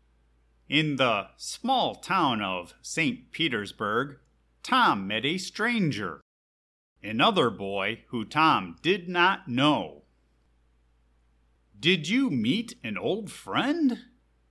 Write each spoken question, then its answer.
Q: Did you meet an old friend?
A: No. I met a stranger, another boy who I did not know.